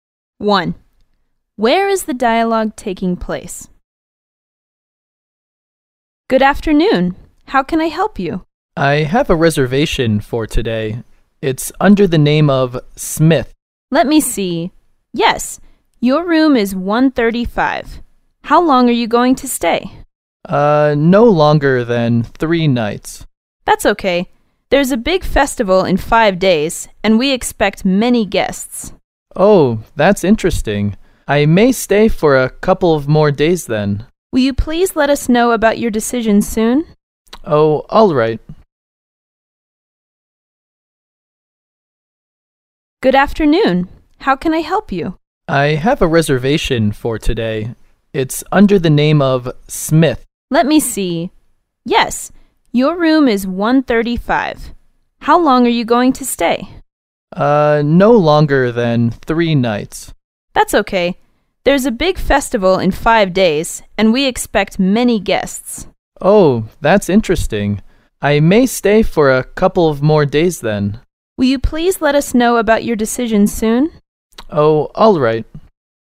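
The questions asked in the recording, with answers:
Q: Where is the dialogue taking place?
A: In a hotel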